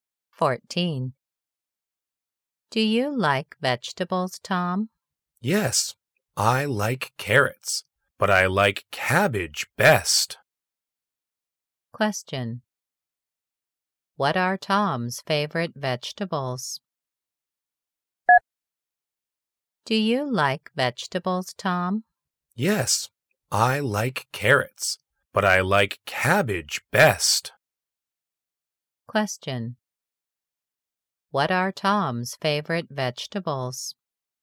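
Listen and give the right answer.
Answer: Cabbage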